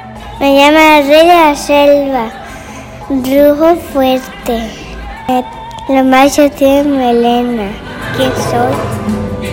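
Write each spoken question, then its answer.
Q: ¿Quién soy?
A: el león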